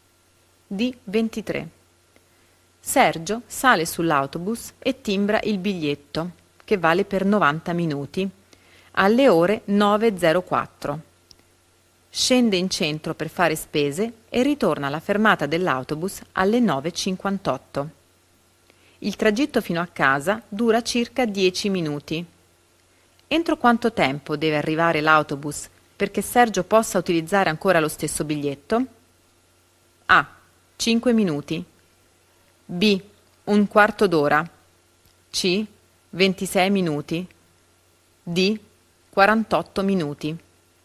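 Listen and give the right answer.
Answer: C: 26 minuti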